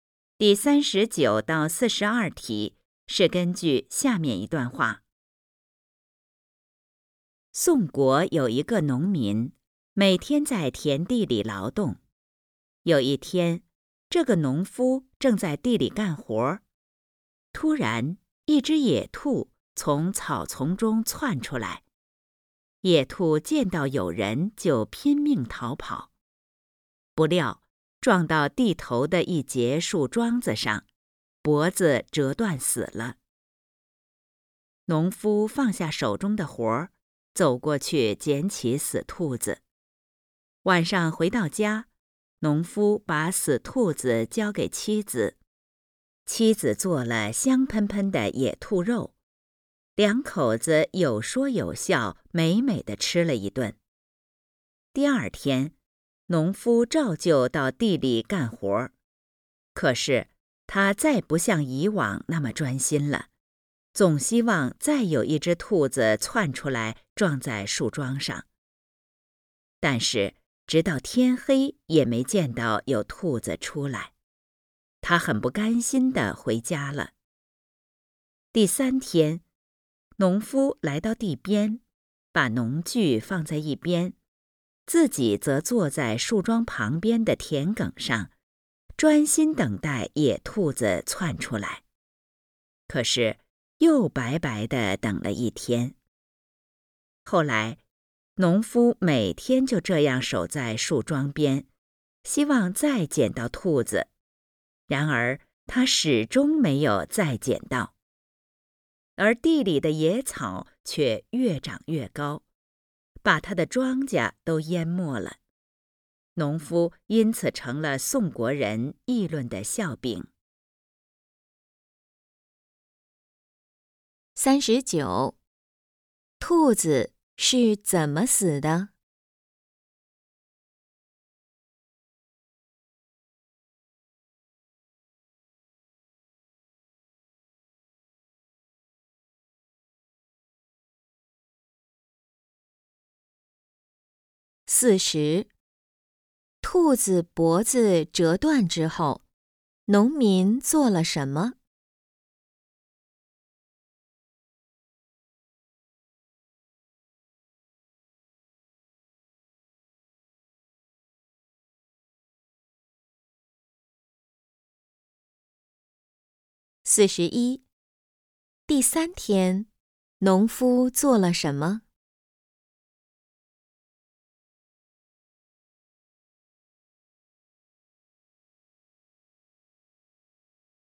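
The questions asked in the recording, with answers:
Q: 兔子是怎么死的?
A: 撞到树桩上,脖子折断死了

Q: 兔子脖子折断之后,农民做了什么?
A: 捡起死兔子,带回家交给妻子

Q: 农夫做了什么?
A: 坐在树桩旁边等兔子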